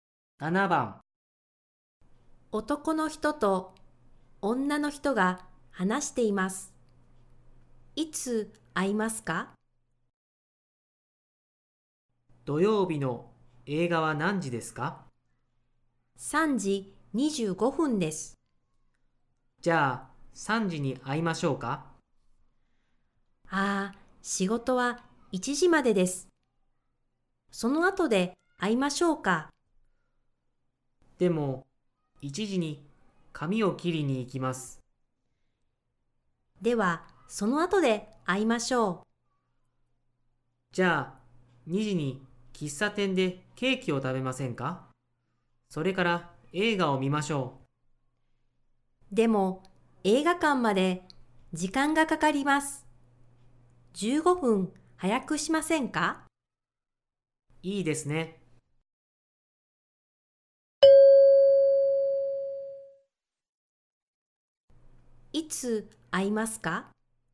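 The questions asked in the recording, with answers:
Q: いつ会いますか?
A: 1時45分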